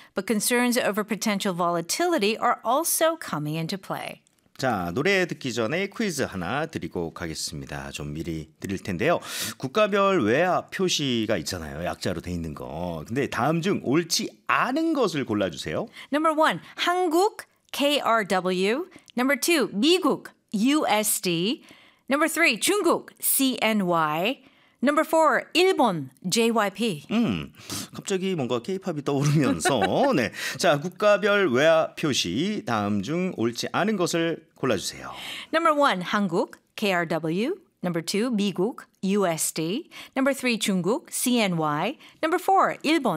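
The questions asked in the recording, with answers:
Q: 자, 국가별 외화 표시 다음 중 옳지 않은 것을 골라주세요.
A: 4: 일본, JYP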